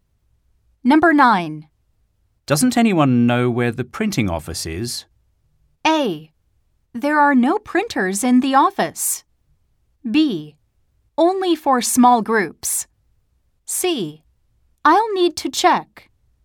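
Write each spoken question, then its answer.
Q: Doesn't anyone know where the printing office is?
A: C: I'll need to check.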